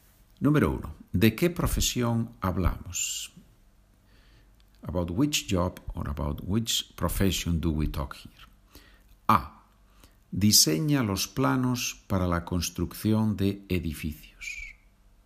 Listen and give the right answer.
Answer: Arquitecto.